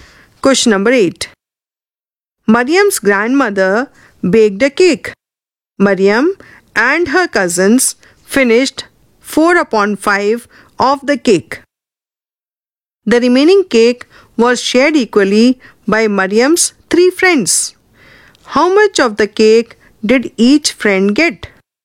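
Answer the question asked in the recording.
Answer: 1/15 of the cake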